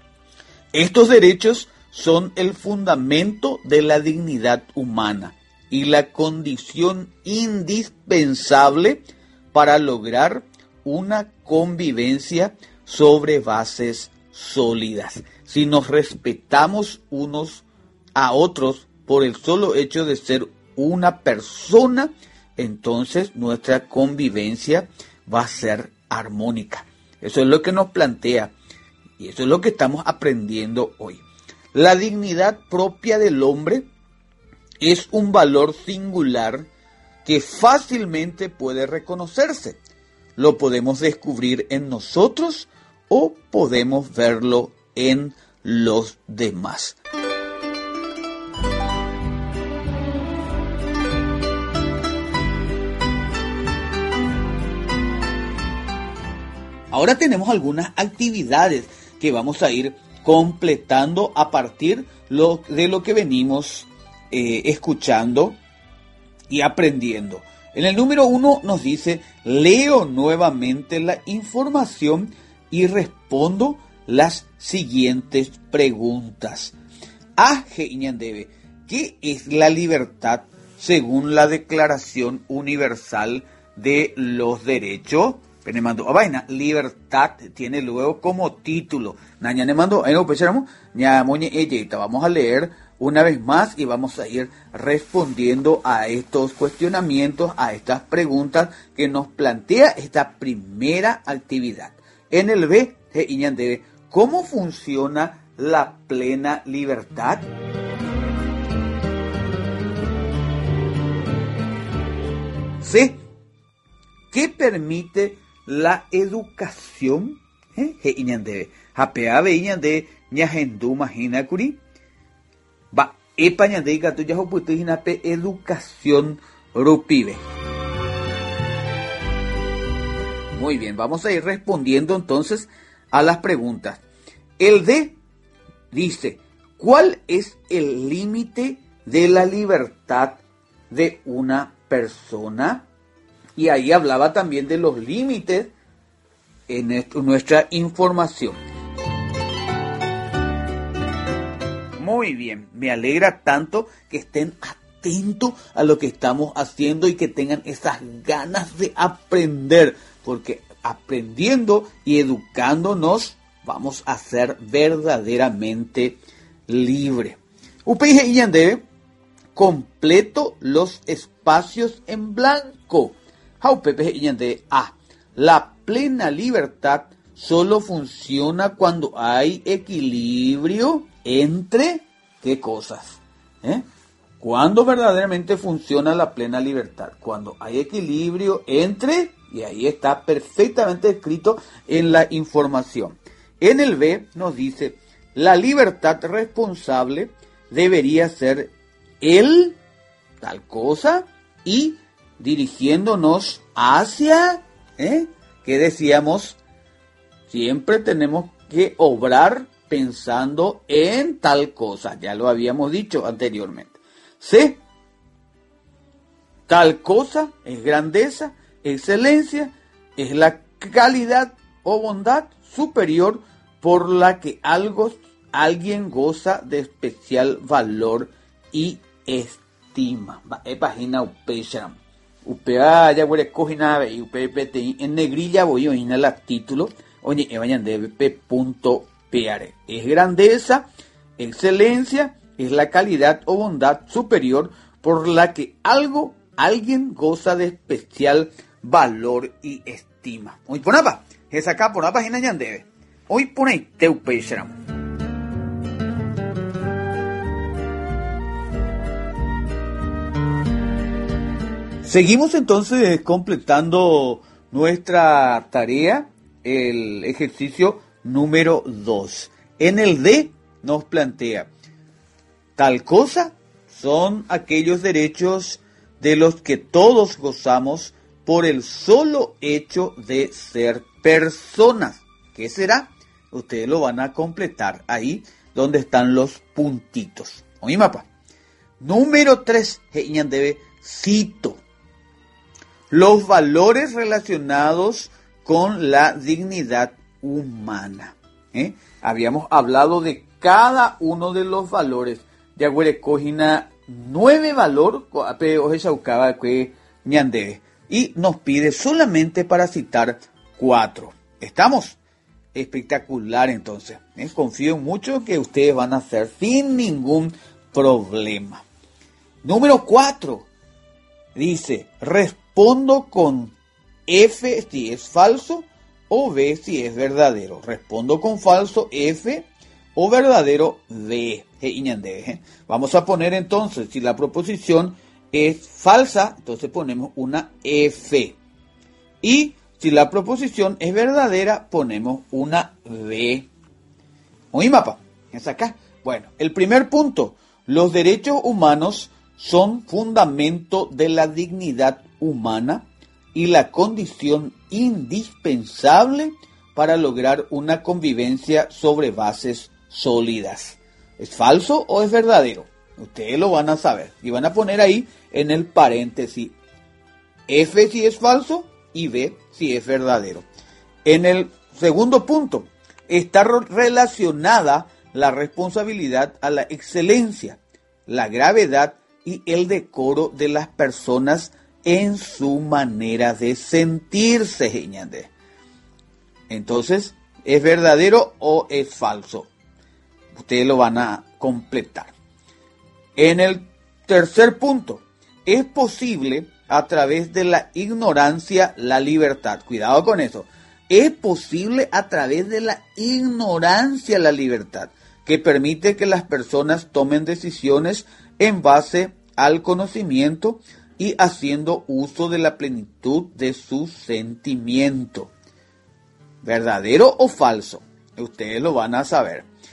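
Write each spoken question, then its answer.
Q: los derechos humanos son fundamento de la dignidad humana y la condición indispensable para lograr una convivencia sobre bases sólidas. ¿Es falso o es verdadero?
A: V: verdadero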